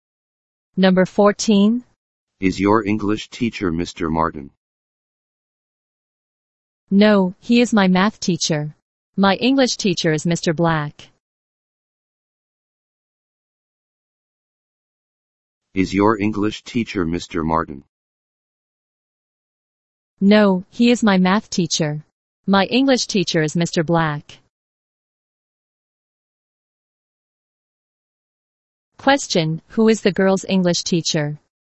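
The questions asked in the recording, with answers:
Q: who is the girl's English teacher?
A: Mr. Black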